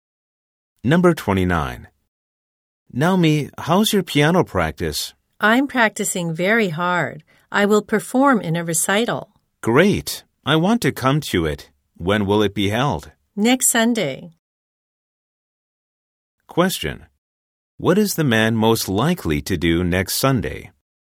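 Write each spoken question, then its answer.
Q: What is the man most likely to do next Sunday?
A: Go to Naomi's piano recital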